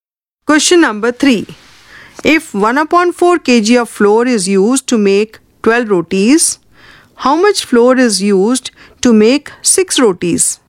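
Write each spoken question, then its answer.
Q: If 1 upon 4 kg of flour is used to make 12 rotis, how much flour is used to make 6 rotis?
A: 1/8 kg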